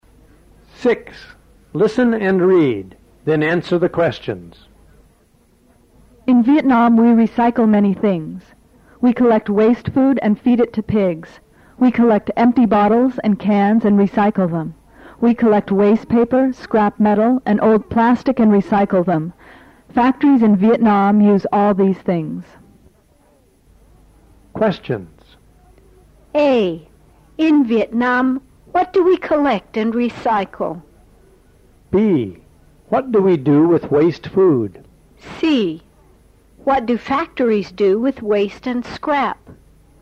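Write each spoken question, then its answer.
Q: In Vietnam, what do we collect and recycle?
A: Empty bottles and cans, waste paper, scrap metal and old plastic

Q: What do we do with waste food?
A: We feed it to pigs

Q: What do factories do with waste and scrap?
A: They use them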